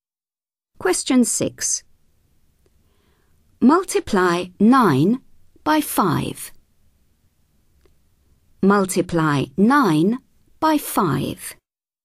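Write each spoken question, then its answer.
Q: Multiply 9 by 5.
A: 45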